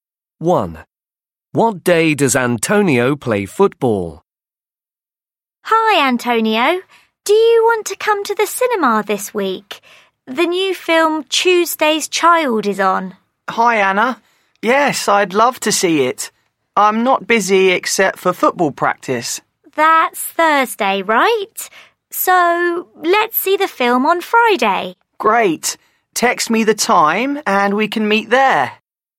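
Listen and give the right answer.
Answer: Thursday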